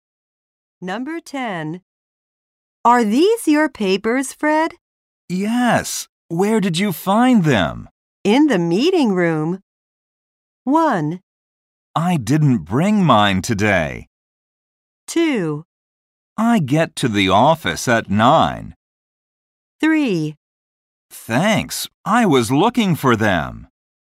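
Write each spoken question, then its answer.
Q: In the meeting room.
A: 3: Thanks. I was looking for them.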